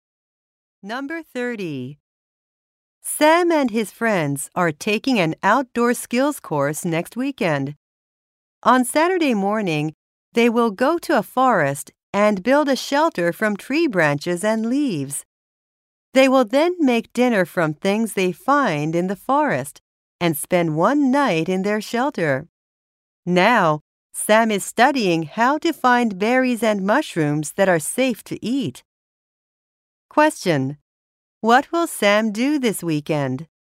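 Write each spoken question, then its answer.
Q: What will Sam do this weekend?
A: Build a shelter in a forest and spend a night in it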